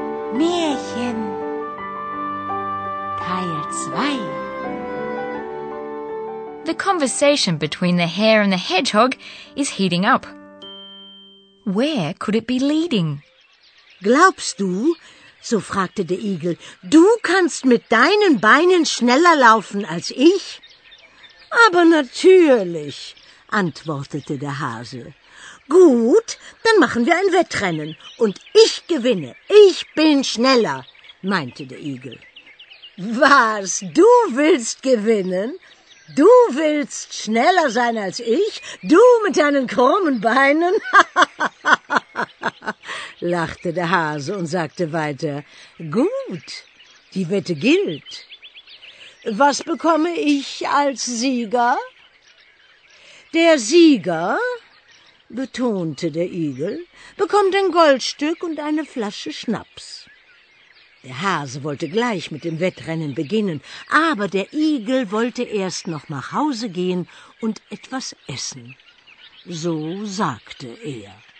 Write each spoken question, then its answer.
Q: Where could it be leading?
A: The conversation leads to a bet, so you're sure to have understood the key words.